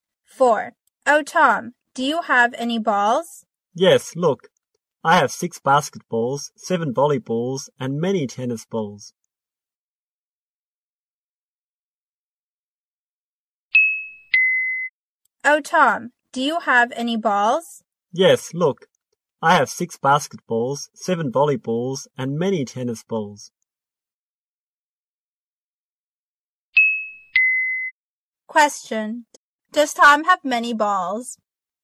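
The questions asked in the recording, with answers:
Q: Does Tom have many balls?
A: Yes, he does.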